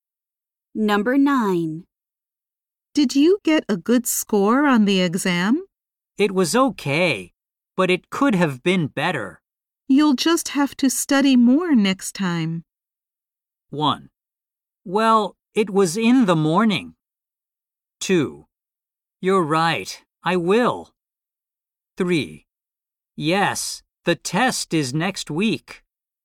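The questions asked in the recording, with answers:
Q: You'll just have to study more next time.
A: 2: You're right, I will.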